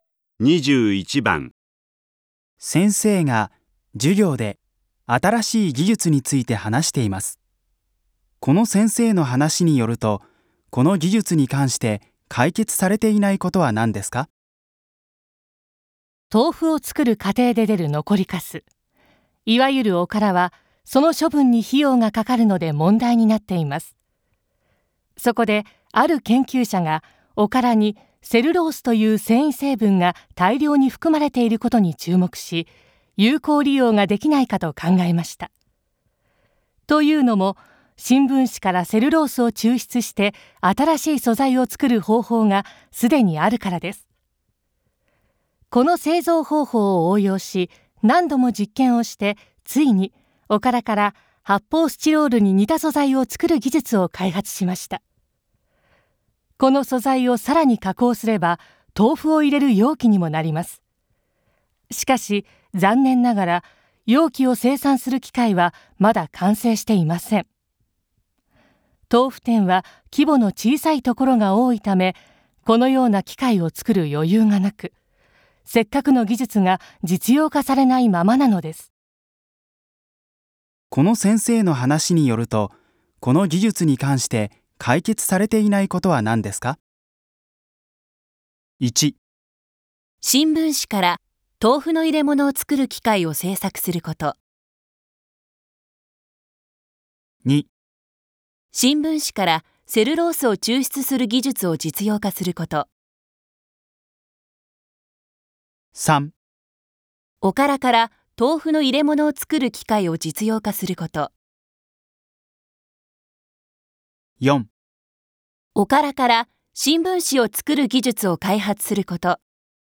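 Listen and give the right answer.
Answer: 3: おからから豆腐の入れ物を作る機械を実用化すること。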